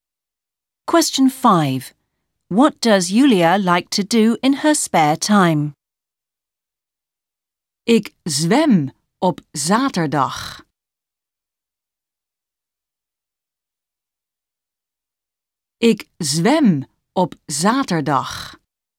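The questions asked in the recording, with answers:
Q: What does Julia like to do in her spare time?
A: Swimming (on Saturdays)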